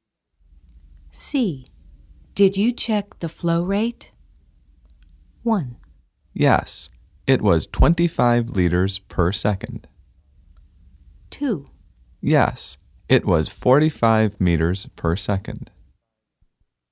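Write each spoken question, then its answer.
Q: Did you check the flow rate?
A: 1: Yes, it was 25 liters per second.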